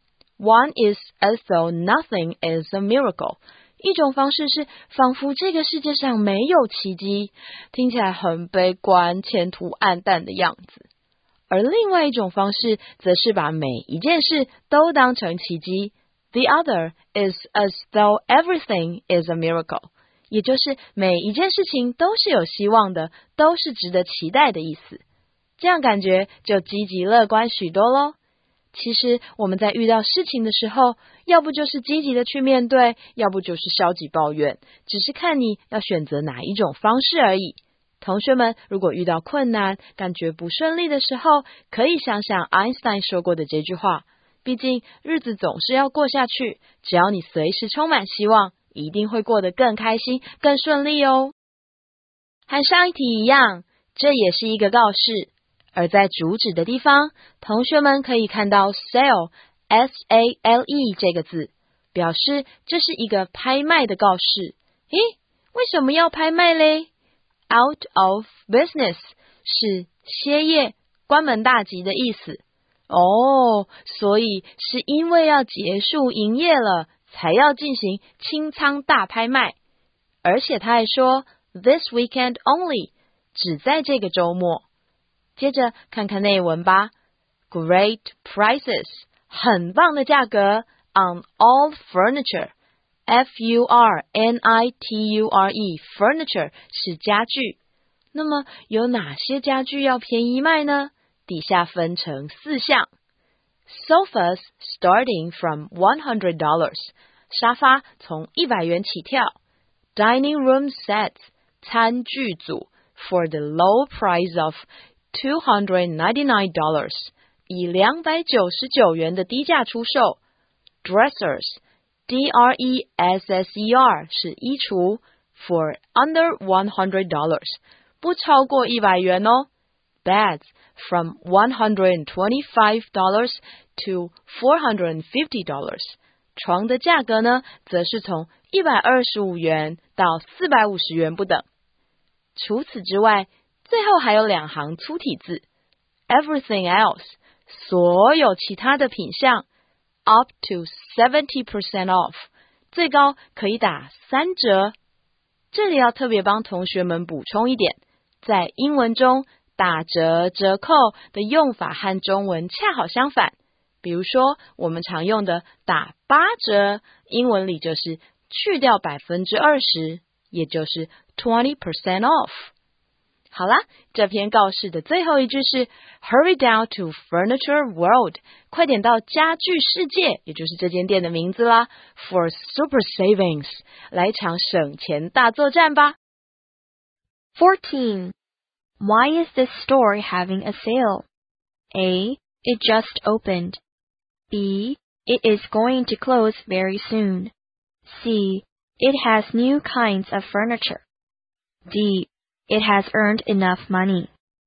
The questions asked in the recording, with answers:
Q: Why is this store having a sale?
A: 从主旨的第一句我们就知道答案要选 B, It is going to close very soon。